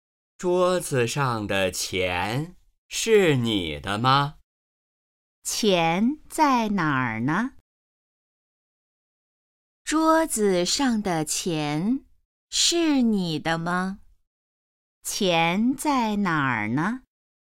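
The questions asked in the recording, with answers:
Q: 钱在哪儿呢?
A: 桌子上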